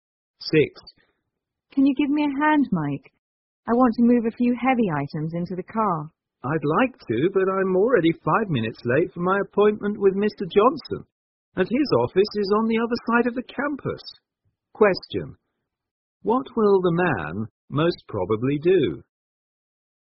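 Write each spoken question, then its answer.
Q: What will the man most probably do?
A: Go to his appointment with Mr. Johnson instead of helping the woman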